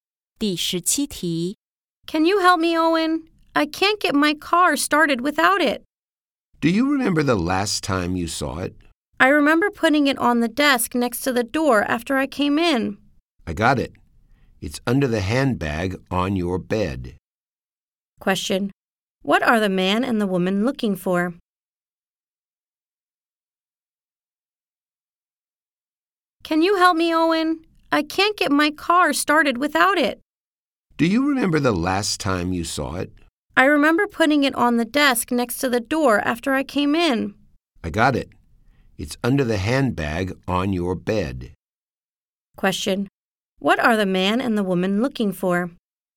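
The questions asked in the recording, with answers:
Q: What are the man and the woman looking for?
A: The car key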